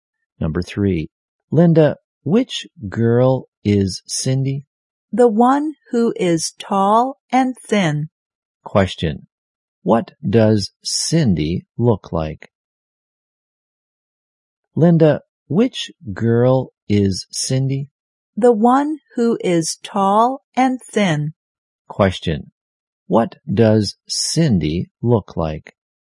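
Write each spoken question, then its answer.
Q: what does Cindy look like?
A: Tall and thin.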